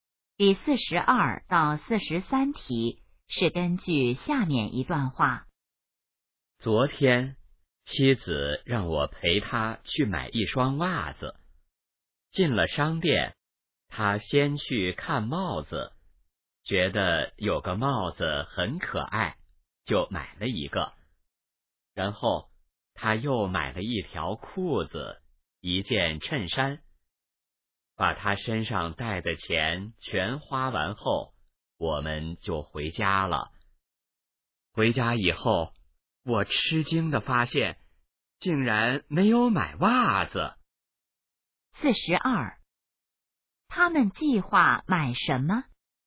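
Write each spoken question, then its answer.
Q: 他们计划买什么?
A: 袜子

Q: 说话人是谁?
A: 丈夫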